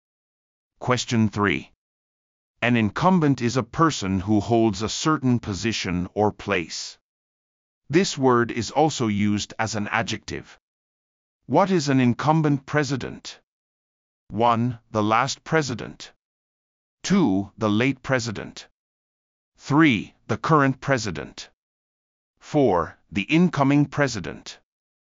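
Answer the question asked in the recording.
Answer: 3: The current president.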